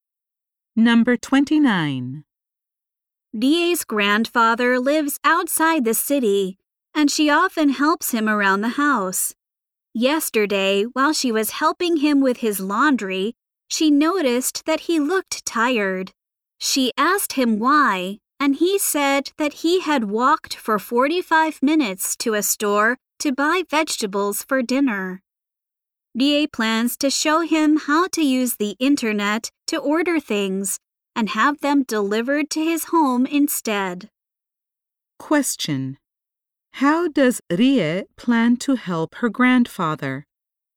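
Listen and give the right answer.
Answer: By showing him how to order things online for home delivery.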